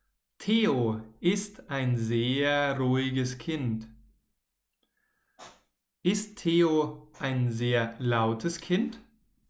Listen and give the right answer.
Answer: Nein, Theo ist kein sehr lautes Kind.